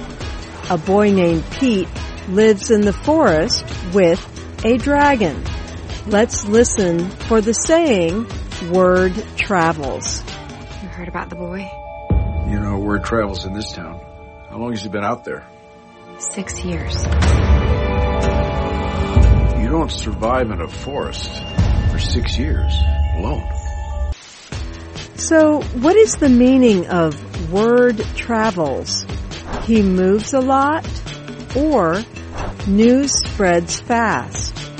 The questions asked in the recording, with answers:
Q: So, what is the meaning of word travels?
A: Word travels means news spreads fast.